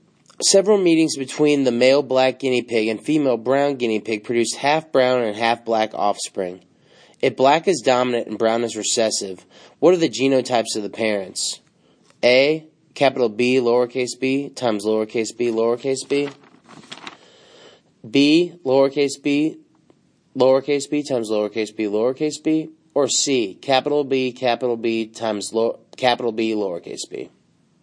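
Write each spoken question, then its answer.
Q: If black is dominant and brown is recessive, what are the genotypes of the parents?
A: A: Bb times bb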